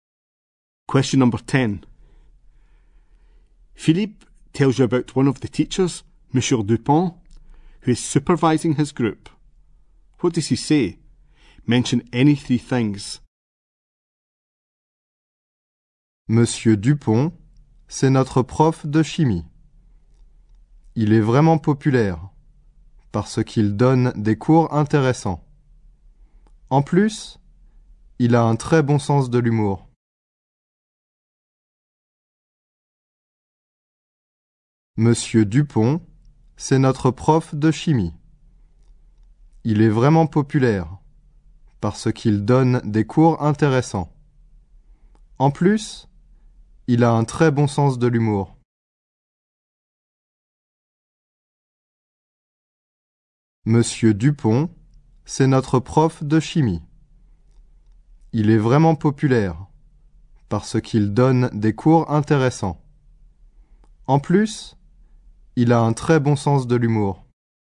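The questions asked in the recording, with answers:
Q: Philippe tells you about one of the teachers, Monsieur Dupont, who is supervising his group. What does he say? Mention any three things.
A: He is their chemistry teacher; he is very popular; he gives interesting lessons; he has a very good sense of humour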